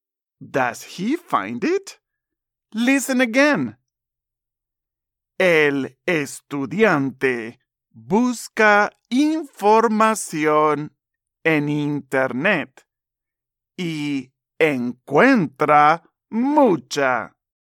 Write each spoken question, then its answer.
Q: Does he find it?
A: Correcto. Yes, he finds a lot.